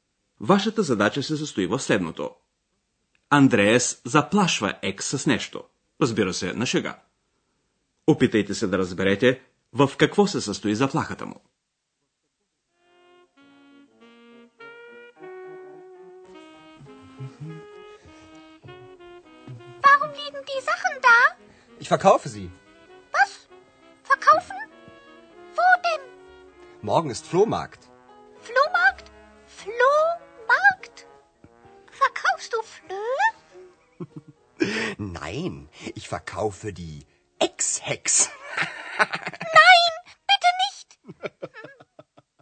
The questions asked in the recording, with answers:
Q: Опитайте се да разберете в какво се състои заплахата му.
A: Андрея заплашва Екс, че ще продаде и нея, заедно с ненужните си вещи.